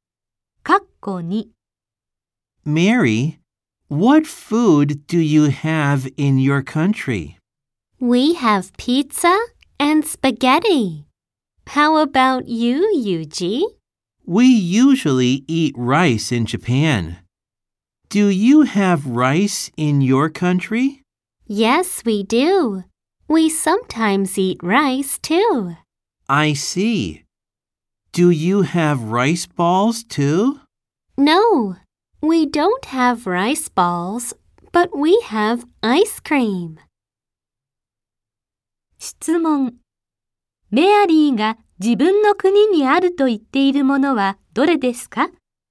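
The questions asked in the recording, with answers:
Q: メアリーが自分の国にあると言っているものはどれですか?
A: ピザ、スパゲッティ、ご飯、アイスクリーム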